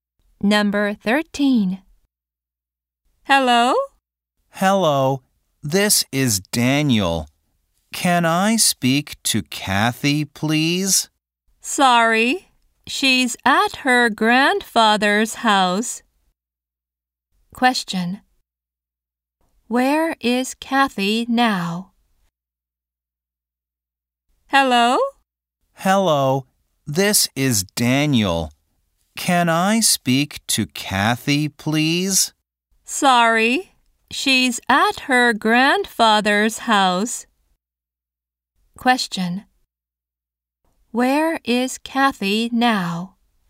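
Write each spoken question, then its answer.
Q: Where is Kathy now?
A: At her grandfather's house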